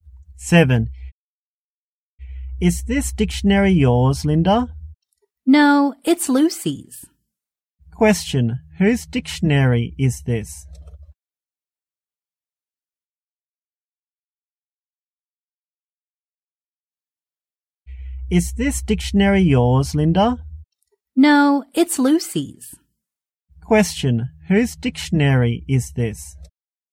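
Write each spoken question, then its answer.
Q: Question, whose dictionary is this?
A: Lucy's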